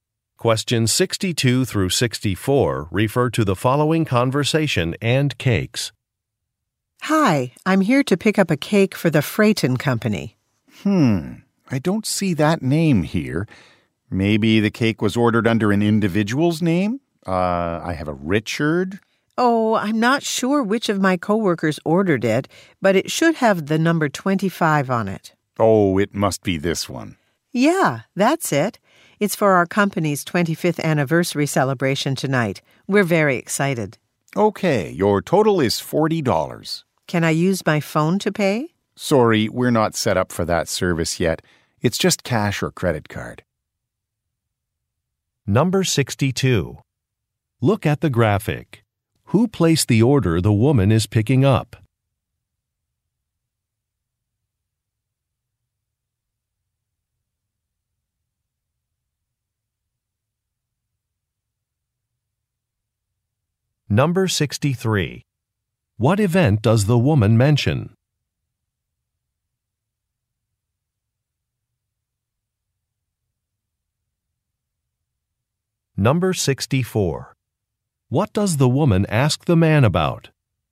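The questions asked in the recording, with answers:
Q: What event does the woman mention?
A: Her company's 25th anniversary celebration

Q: What does the woman ask the man about?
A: Whether she can pay with her phone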